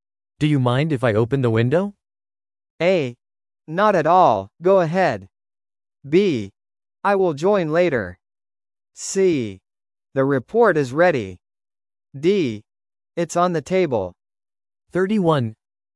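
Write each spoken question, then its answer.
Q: Do you mind if I open the window?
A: A: Not at all, go ahead.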